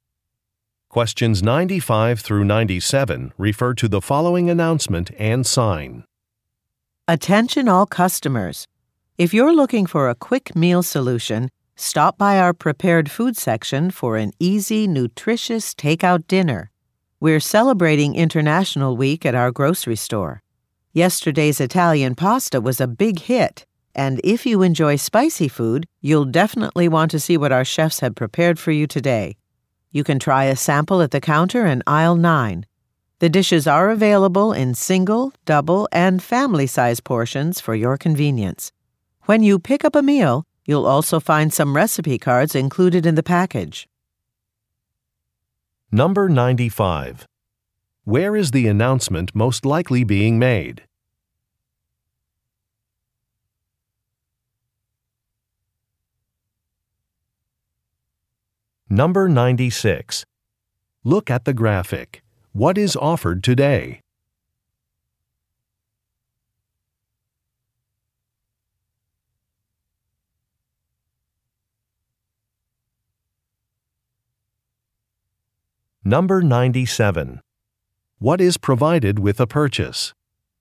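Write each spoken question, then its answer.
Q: Where is the announcement most likely being made?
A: At a grocery store

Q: What is provided with a purchase?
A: Recipe cards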